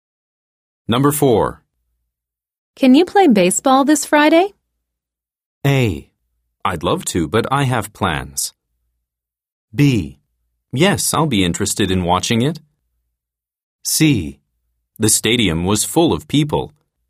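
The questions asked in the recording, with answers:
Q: Can you play baseball this Friday?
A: A: I'd love to, but I have plans.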